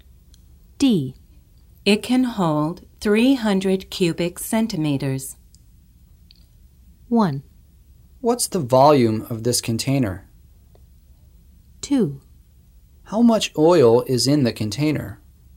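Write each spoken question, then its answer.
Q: It can hold 300 cubic centimeters.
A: 1: What's the volume of this container?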